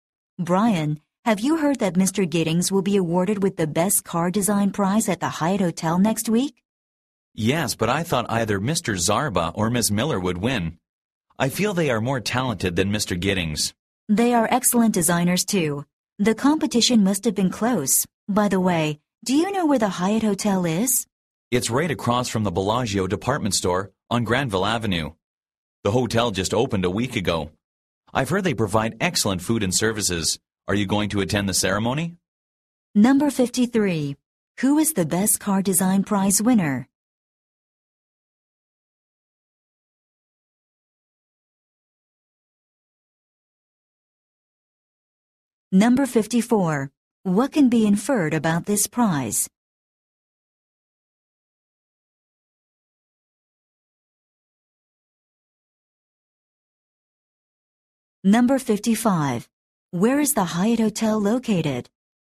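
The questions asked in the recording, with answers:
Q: Who is the Best Car Design Prize winner?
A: Mr. Giddings

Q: Where is the Hyatt Hotel located?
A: Across from the Bellagio department store on Granville Avenue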